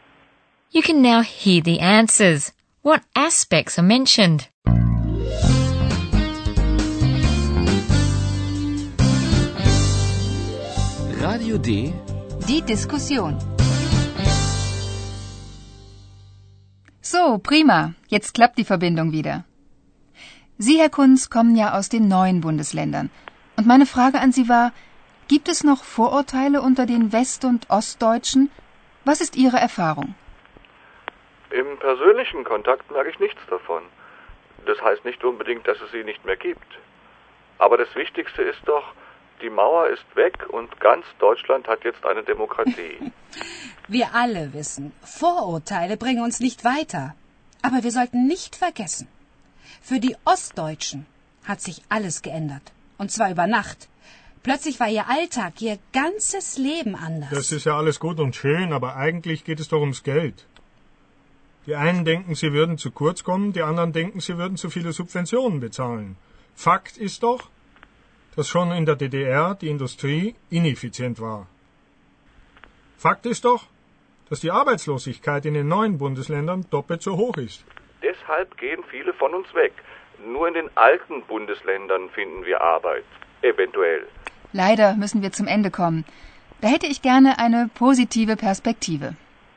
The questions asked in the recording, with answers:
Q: What aspects are mentioned?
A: Herr Kunz says that he doesn't notice any prejudices as far as personal contacts go.